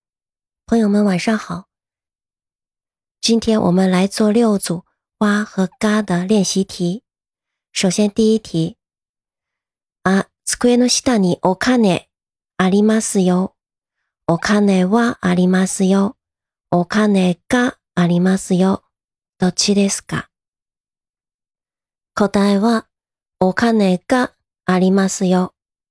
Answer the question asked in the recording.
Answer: 答えはお金がありますよ。